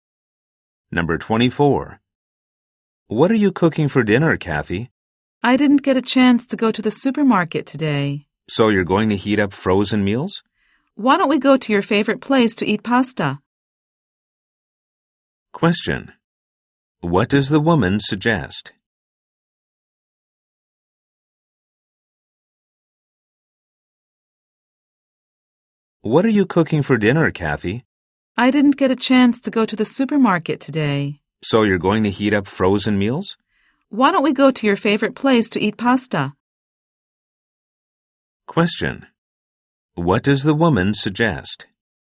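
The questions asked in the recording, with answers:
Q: What does the woman suggest?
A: Going out to eat pasta at his favorite place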